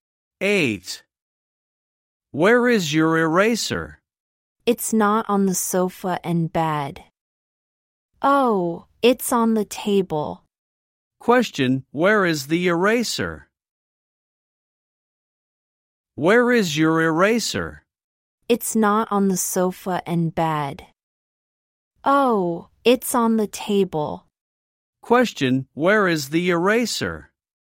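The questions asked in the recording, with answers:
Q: Question, where is the eraser?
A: On the table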